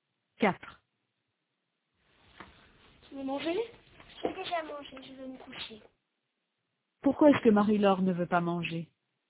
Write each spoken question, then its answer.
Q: Pourquoi est-ce que Marie-Laure ne veut pas manger?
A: Parce qu'elle a déjà mangé.